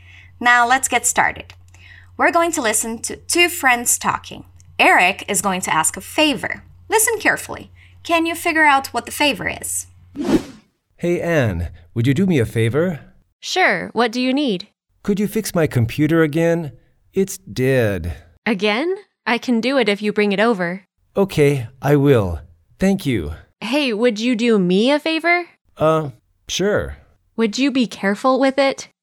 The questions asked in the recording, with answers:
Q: Can you figure out what the favor is?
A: His computer is not working.